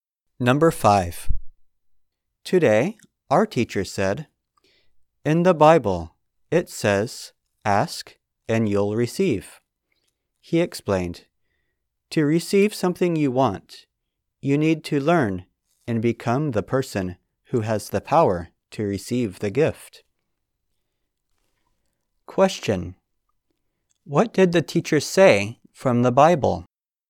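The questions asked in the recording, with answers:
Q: What did the teacher say from the Bible?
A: Ask and you'll receive.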